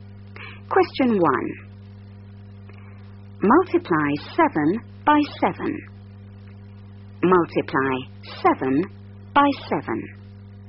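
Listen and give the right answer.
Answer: 49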